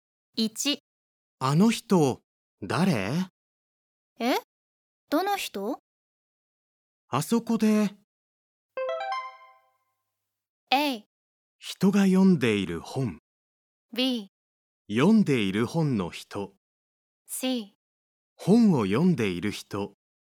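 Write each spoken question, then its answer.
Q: あの人、誰?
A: C: 本を読んでいる人。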